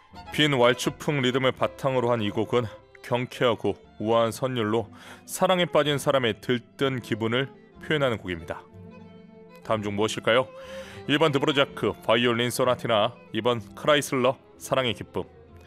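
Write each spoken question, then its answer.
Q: 다음 중 무엇일까요?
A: 2: 크라이슬러, 사랑의 기쁨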